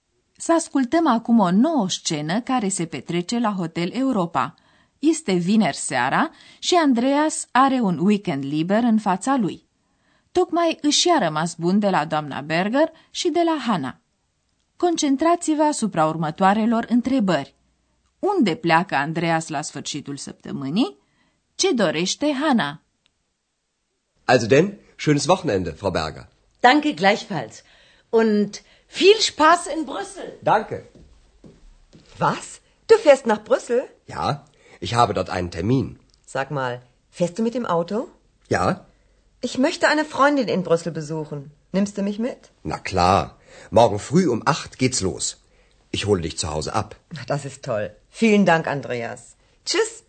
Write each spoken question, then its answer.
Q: Unde pleacă Andreas la sfârșitul săptămânii?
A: Andreas pleacă la sfârșitul săptămânii cu mașina la Bruxelles

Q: Ce dorește Hana?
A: iar Hana vrea să facă acolo o vizită unei prietene.